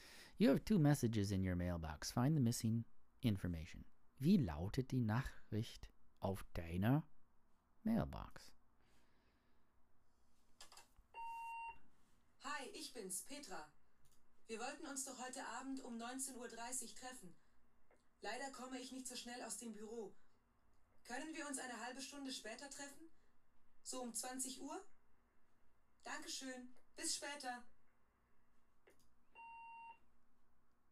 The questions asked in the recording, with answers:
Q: Wie lautet die Nachricht auf deiner Mailbox?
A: 20 Uhr.